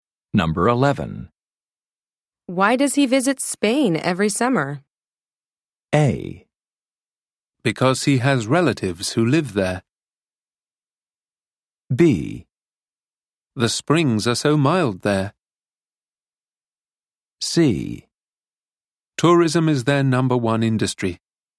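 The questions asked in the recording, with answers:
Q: Why does he visit Spain every summer?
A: A: Because he has relatives who live there.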